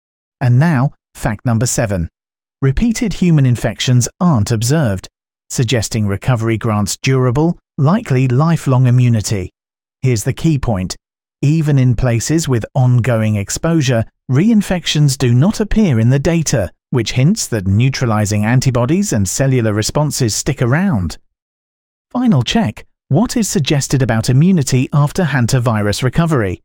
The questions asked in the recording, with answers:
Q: Final check. What is suggested about immunity after hantavirus recovery?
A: Correct answer, lifelong immunity.